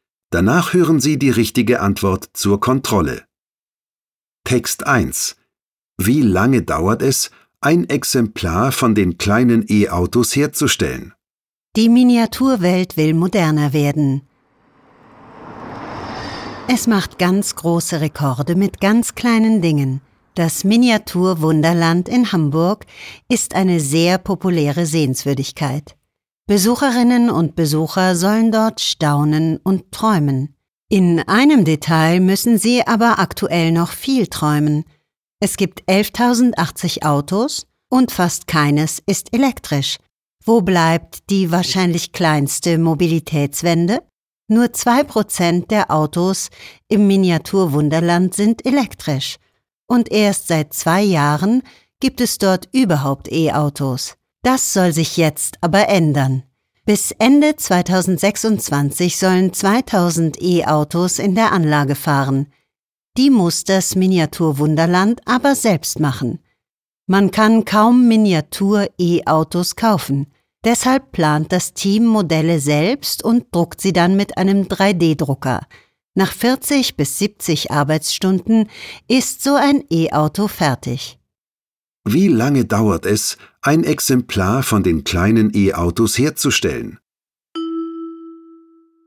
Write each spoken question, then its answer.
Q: Wie lange dauert es, ein Exemplar von den kleinen E-Autos herzustellen?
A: 40 bis 70 Stunden dauert die Arbeit an einem Miniatur-E-Auto.